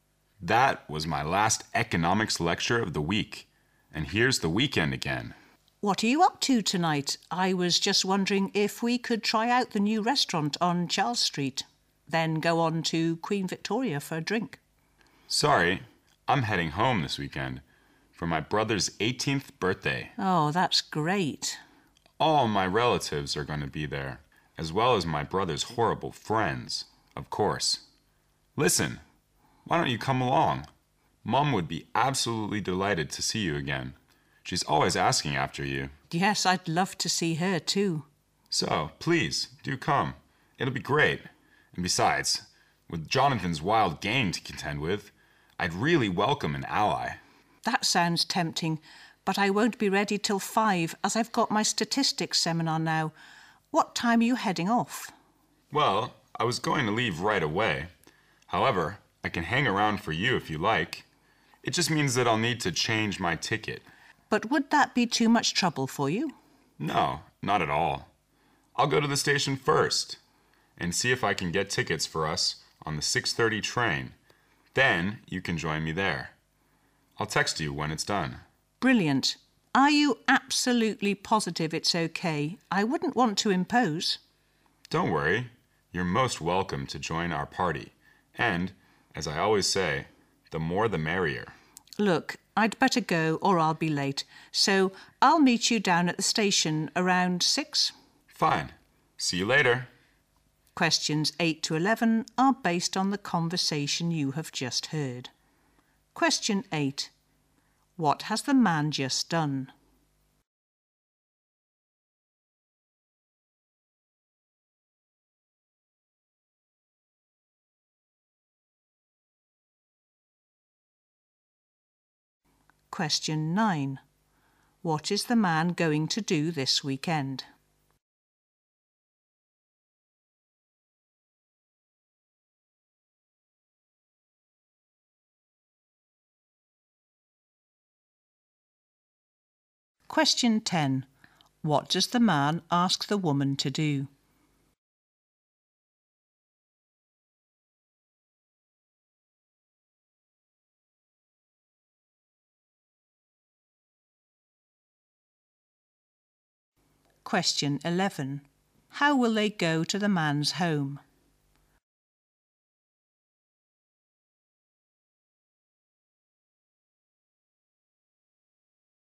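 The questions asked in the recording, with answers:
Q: What has the man just done?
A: Attended his last economics lecture of the week

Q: What is the man going to do this weekend?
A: Go home for his brother's 18th birthday

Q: What does the man ask the woman to do?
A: Come along with him to the party

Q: How will they go to the man's home?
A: By train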